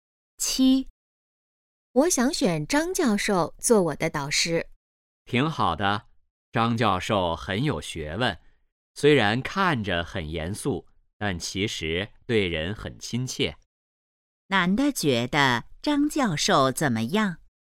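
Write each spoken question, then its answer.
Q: 男的觉得张教授怎么样?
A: 很有学问,对人很亲切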